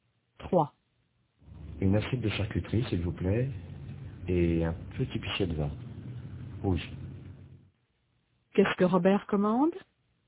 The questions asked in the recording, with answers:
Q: Qu'est-ce que Robert commande?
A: Une assiette de charcuterie et un petit pichet de vin rouge.